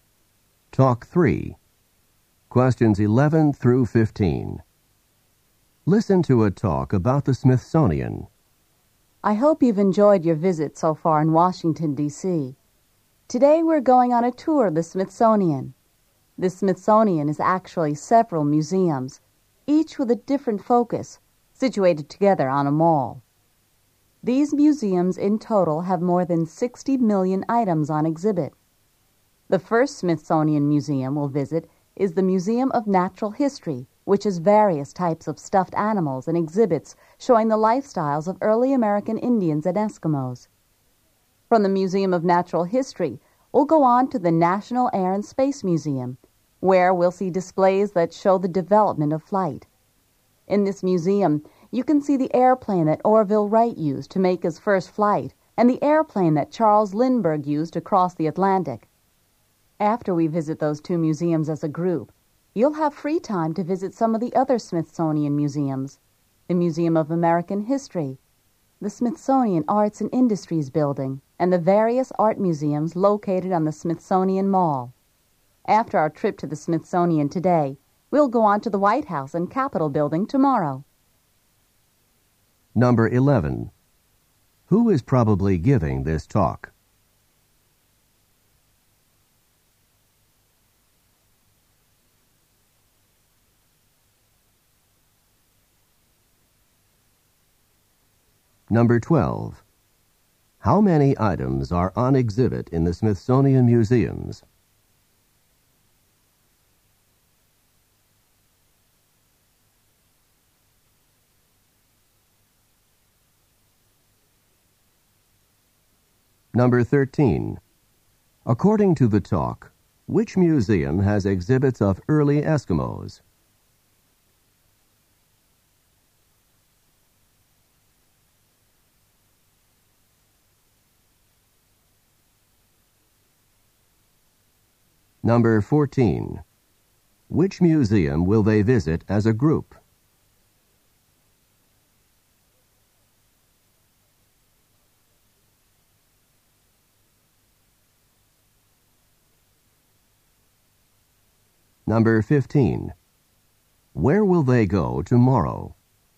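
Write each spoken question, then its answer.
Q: Who is probably giving this talk?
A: A tour guide

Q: How many items are on exhibit in the Smithsonian Museums?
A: More than 60 million

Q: According to the talk, which museum has exhibits of early Eskimos?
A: The Museum of Natural History

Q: Which museum will they visit as a group?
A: The Museum of Natural History and the National Air and Space Museum

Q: Where will they go tomorrow?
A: To the White House and the Capitol Building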